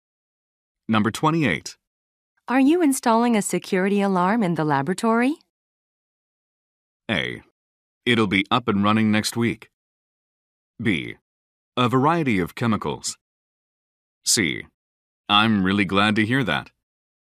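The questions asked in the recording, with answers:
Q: Are you installing a security alarm in the laboratory?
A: A: It'll be up and running next week.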